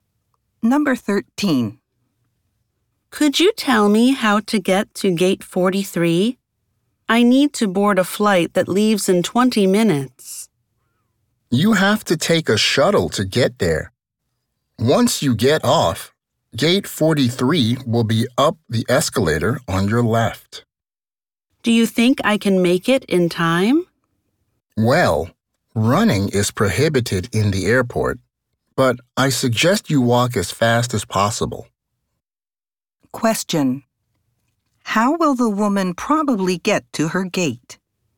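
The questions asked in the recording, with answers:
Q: How will the woman probably get to her gate?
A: By taking a shuttle and then walking quickly up the escalator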